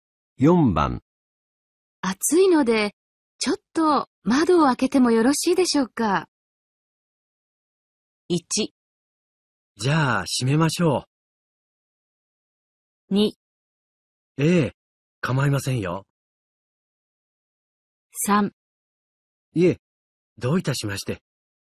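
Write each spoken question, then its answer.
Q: 暑いので、ちょっと窓を開けてもよろしいでしょうか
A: 2: ええ、構いませんよ。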